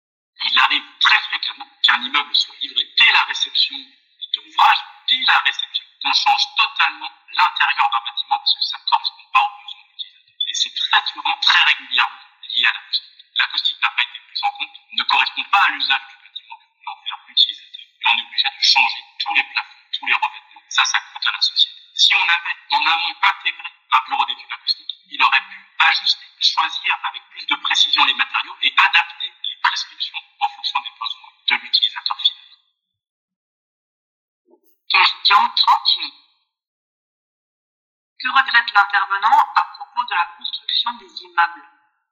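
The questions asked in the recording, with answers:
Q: Que regrette l'intervenant à propos de la construction des immeubles ?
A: Que l'acoustique ne soit pas prise en compte en amont : on doit refaire l'intérieur (plafonds, revêtements) dès la livraison, ce qui coûte cher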